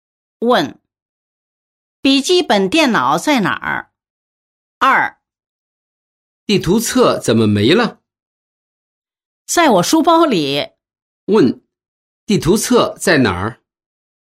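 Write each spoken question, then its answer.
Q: 地图册在哪儿?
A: 书包里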